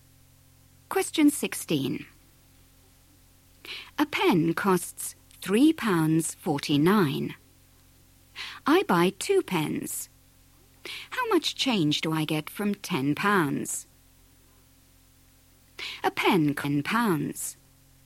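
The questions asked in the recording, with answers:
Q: How much change do I get from £10?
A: £3.02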